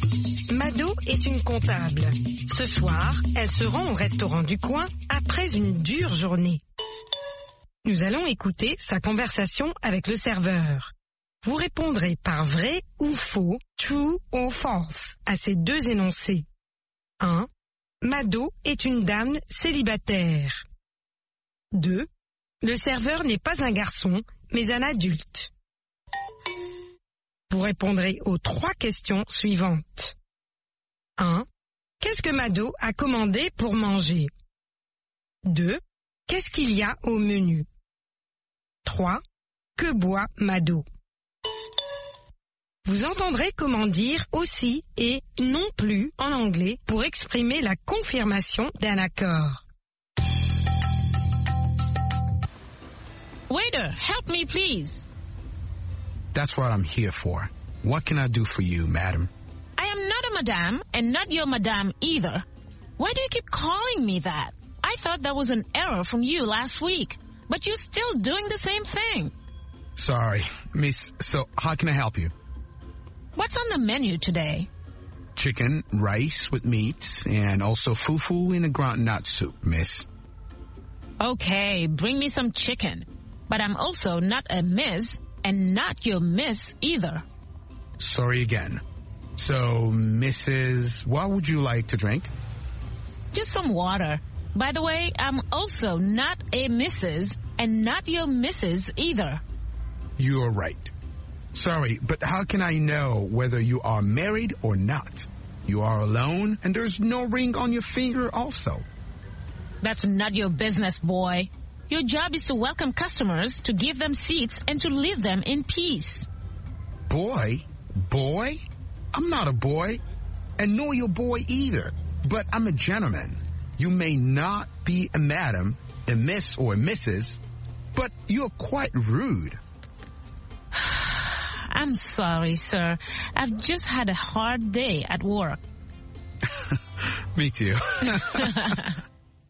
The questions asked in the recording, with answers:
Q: Le serveur n'est pas un garçon, mais un adulte.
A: L'énoncé 2 est vrai. Le serveur n'est pas un garçon, mais un adulte.

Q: Qu'est-ce que Mado a commandé pour manger?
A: Elle a commandé du poulet.

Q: Qu'est-ce qu'il y a au menu?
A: Du poulet, du riz, de la viande et du foufou.

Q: Que boit Mado?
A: De l'eau.